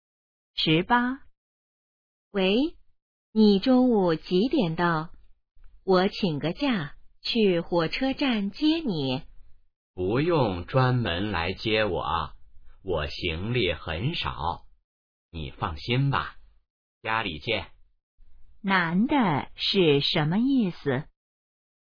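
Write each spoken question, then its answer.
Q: 男的是什么意思?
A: 不用来接他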